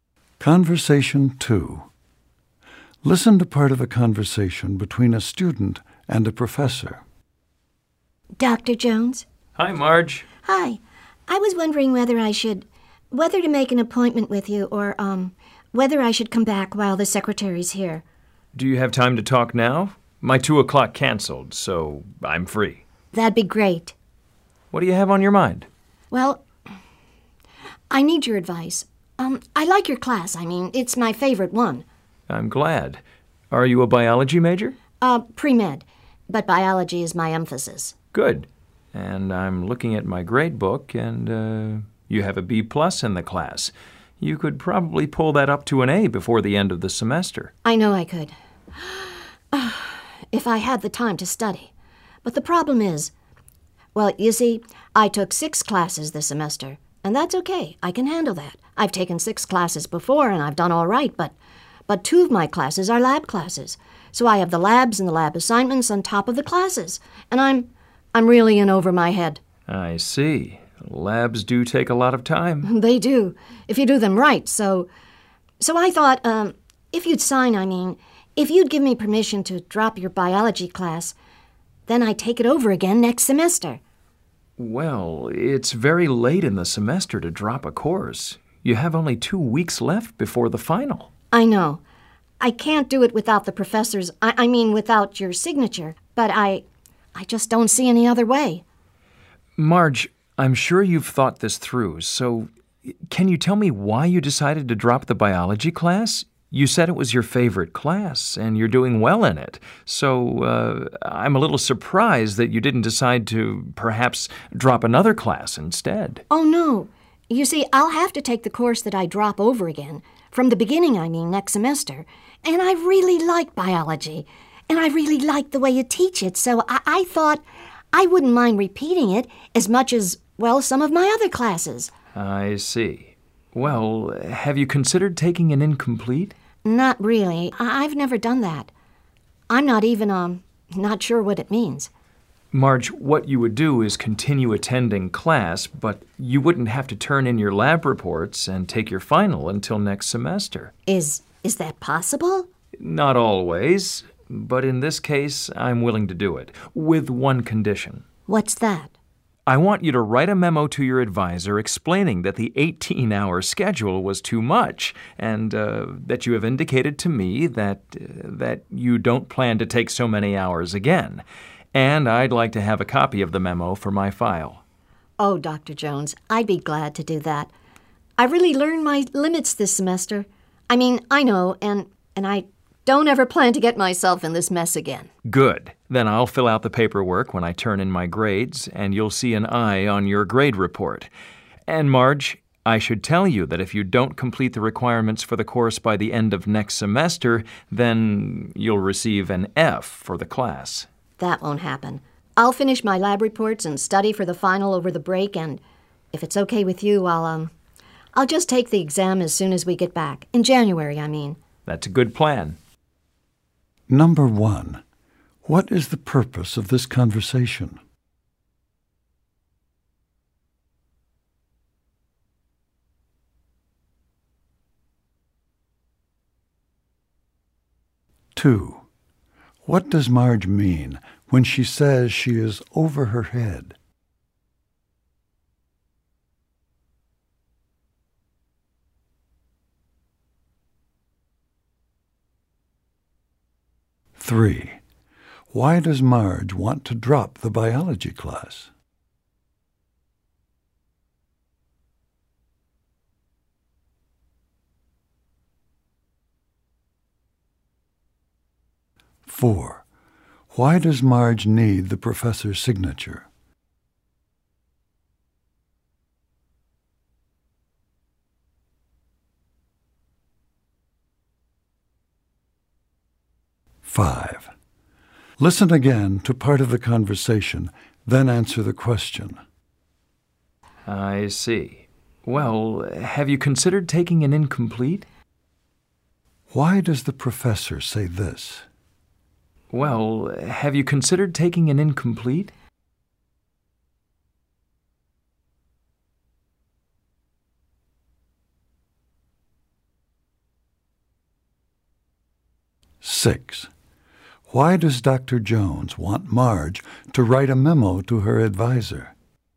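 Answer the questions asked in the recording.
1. To get permission to drop the biology class
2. She has too much work to handle
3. She likes it and wouldn't mind repeating it
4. It is late in the semester to drop a course
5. To suggest an alternative to dropping the class
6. To explain her schedule was too heavy and she won't take so many hours again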